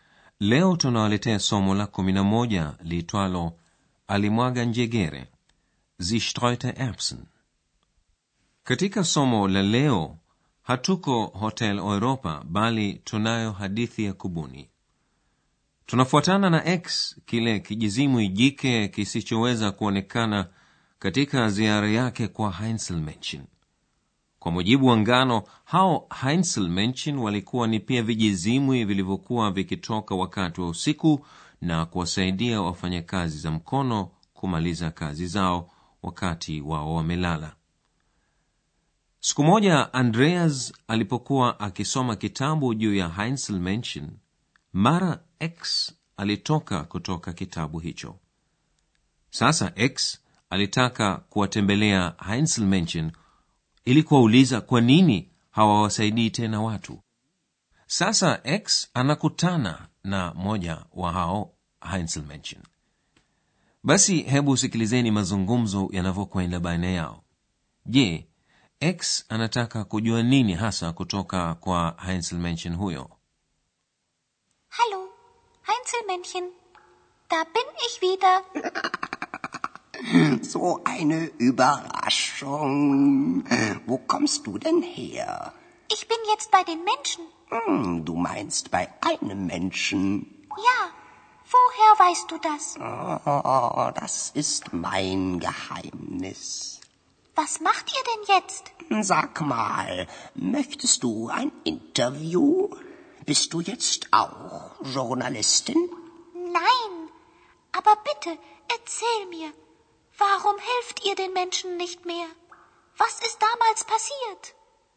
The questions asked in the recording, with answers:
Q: je x anataka kujua nini hasa kutoka kwa Heinzel huyo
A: x ana hamu kubwa ya kutaka kujua kwa nini heinsel Menchen hawawasaidii tena binadamu anataka kujua kimetokea nini